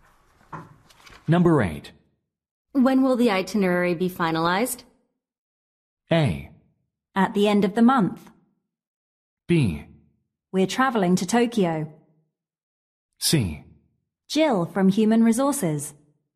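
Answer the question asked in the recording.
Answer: A: At the end of the month.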